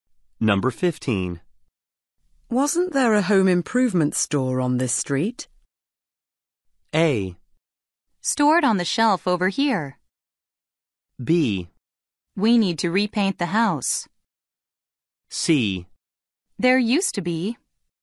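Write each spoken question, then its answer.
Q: Wasn't there a home improvement store on this street?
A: C: There used to be.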